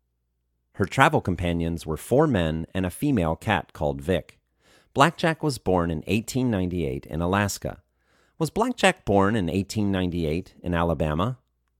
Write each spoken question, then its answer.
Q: Was Blackjack born in 1898 in Alabama?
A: No, Blackjack wasn't born in 1898 in Alabama.